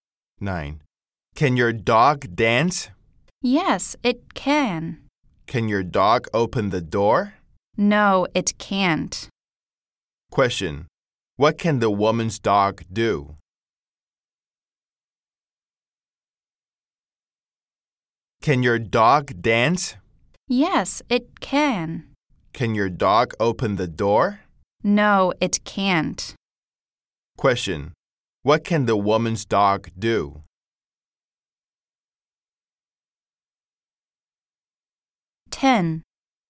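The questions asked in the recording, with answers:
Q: Question. What can the woman's dog do?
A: It can dance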